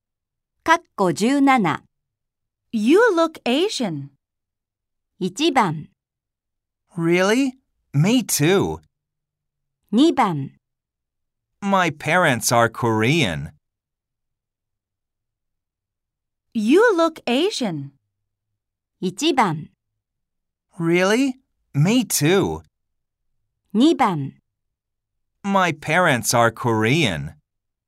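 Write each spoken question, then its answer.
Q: You look Asian.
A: 2: My parents are Korean.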